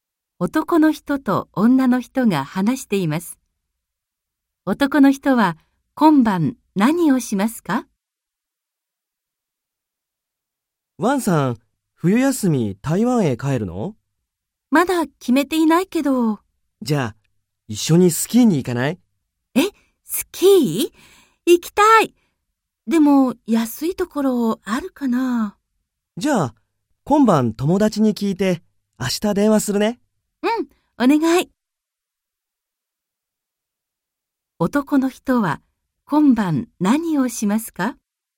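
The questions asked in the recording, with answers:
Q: 男の人は今晩何をしますか?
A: 友達に安いスキーの場所を聞きます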